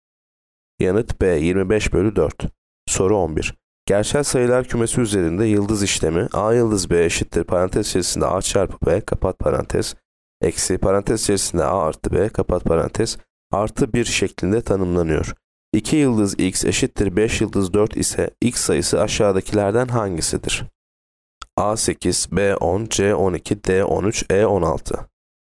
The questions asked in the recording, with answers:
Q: 2 yıldız x eşittir 5 yıldız 4 ise x sayısı aşağıdakilerden hangisidir?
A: Yanıt D 13.